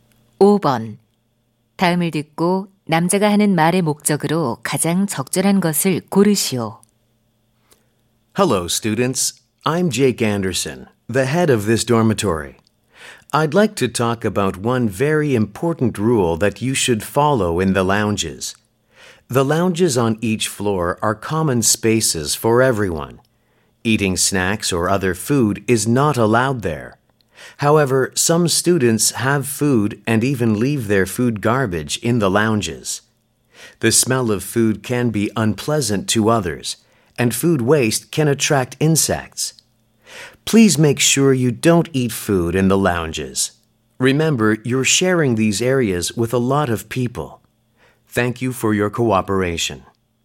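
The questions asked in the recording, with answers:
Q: 다음을 듣고 남자가 하는 말의 목적으로 가장 적절한 것을 고르시오.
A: 라운지에서 음식을 먹지 말 것을 당부하려고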